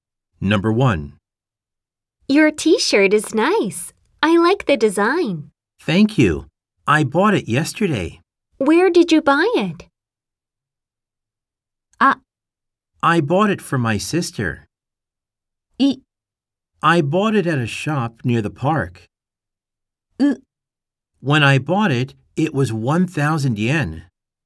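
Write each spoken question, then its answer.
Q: Where did you buy it?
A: B: I bought it at a shop near the park.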